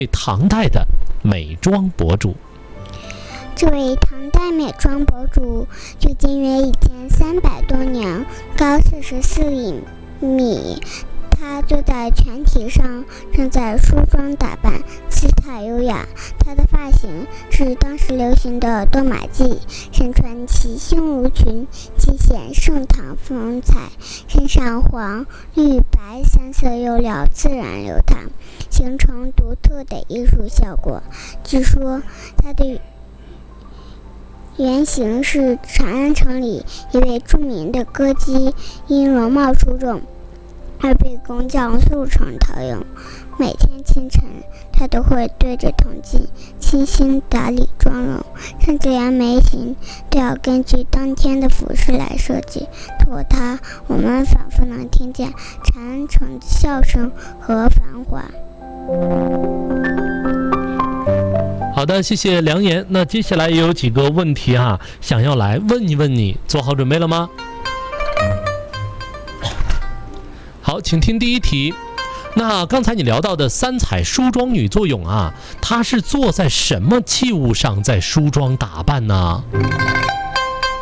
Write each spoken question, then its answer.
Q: 那刚才你聊到的三彩梳妆女作俑啊,她是坐在什么器物上在梳妆打扮呢?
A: 泉体上。